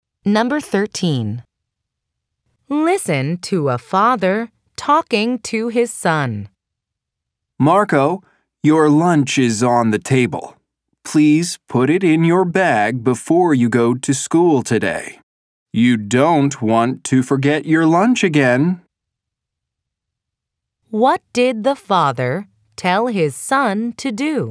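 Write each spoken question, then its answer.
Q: What did the father tell his son to do?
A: Put his lunch in his bag before going to school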